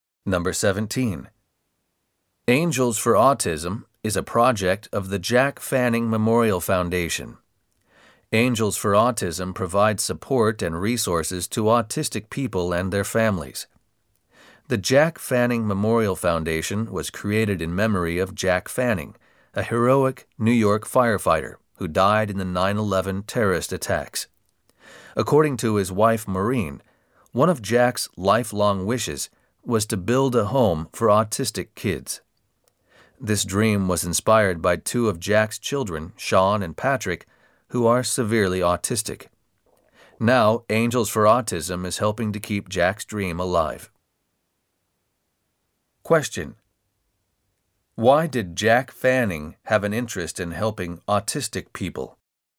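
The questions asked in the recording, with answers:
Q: Why did Jack Fanning have an interest in helping autistic people?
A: Because two of his children, Sean and Patrick, are severely autistic.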